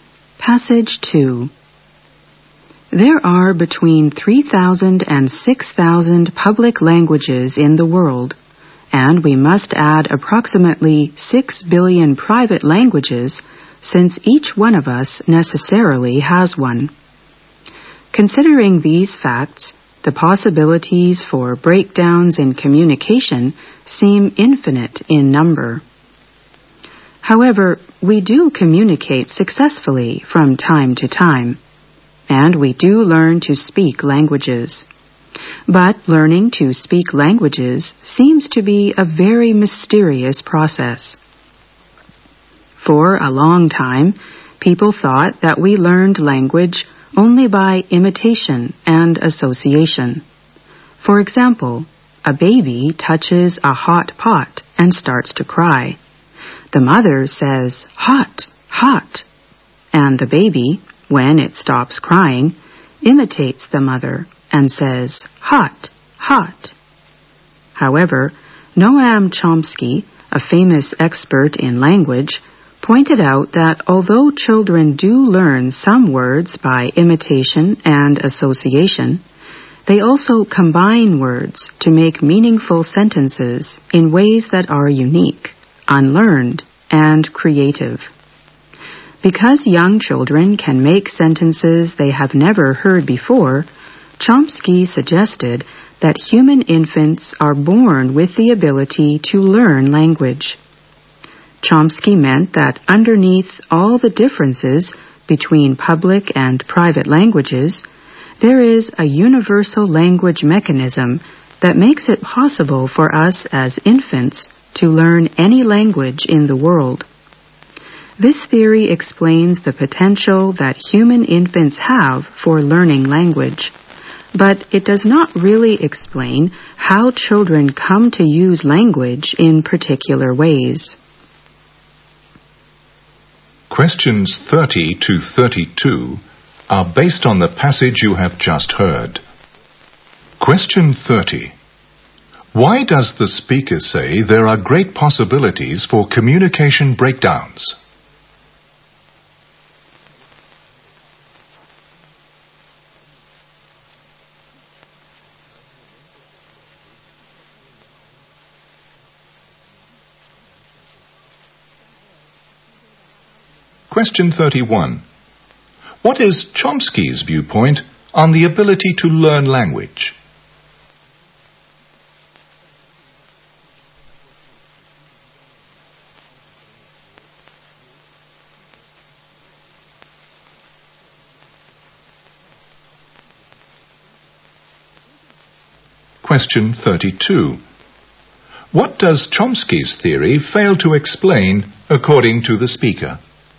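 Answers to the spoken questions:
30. There are thousands of public languages and billions of private languages.
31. Humans are born with the ability to learn language.
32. How children come to use language in particular ways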